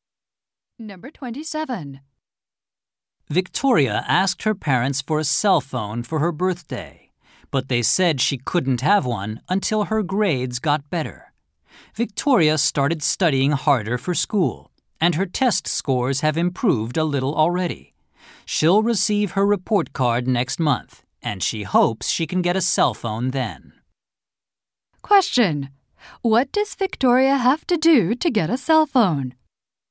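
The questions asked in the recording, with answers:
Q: What does Victoria have to do to get a cell phone?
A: Get better grades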